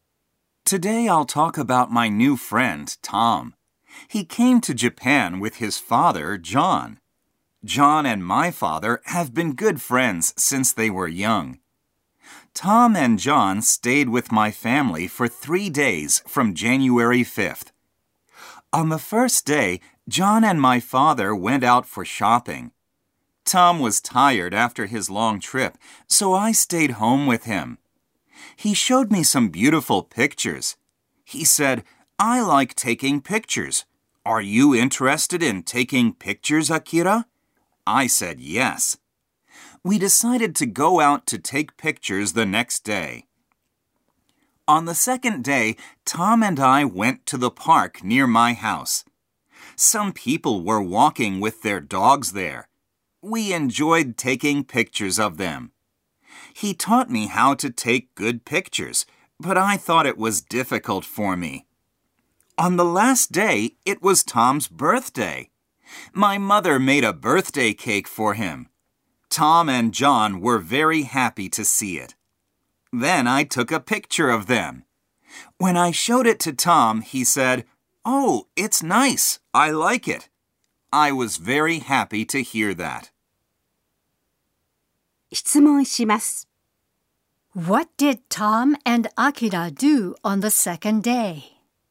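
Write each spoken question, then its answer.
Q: What did Tom and Akira do on the second day?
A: They went to the park near Akira's house and took pictures of people walking their dogs.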